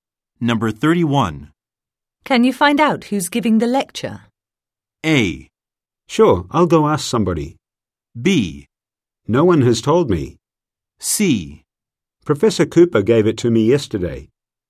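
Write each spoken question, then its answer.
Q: Can you find out who's giving the lecture?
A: A: Sure, I'll go ask somebody.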